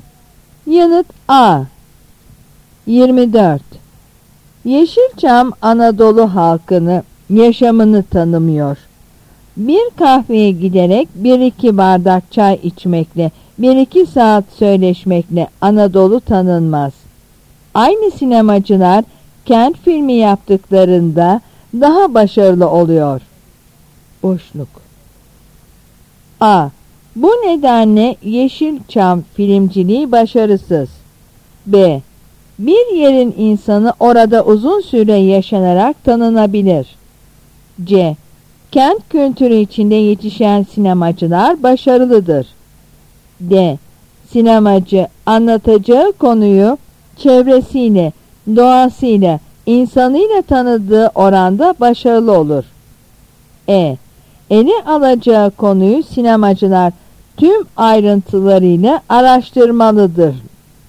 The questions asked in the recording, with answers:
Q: Boşluk.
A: Yanıt D.